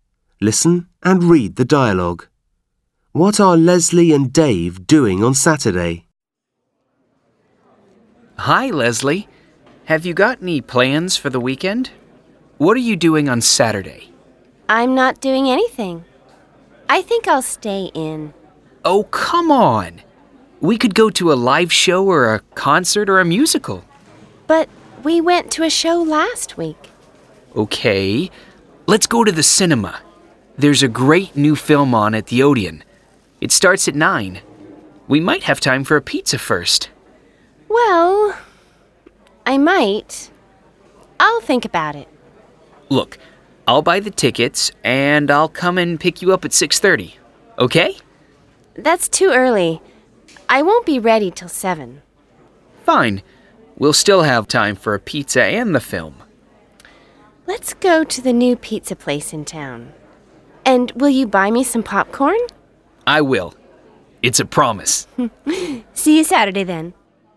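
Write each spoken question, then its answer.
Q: What are Leslie and Dave doing on Saturday?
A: Going for a pizza and then to the cinema to see a film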